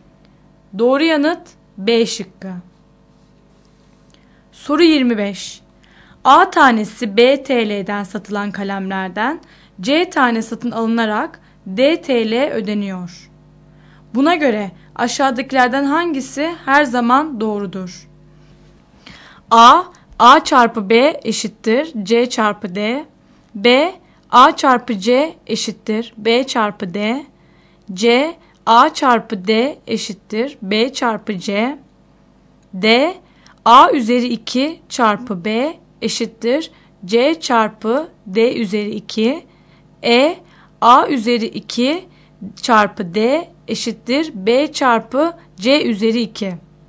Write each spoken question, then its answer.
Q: Buna göre aşağıdakilerden hangisi her zaman doğrudur?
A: Doğru yanıt C şıkkı.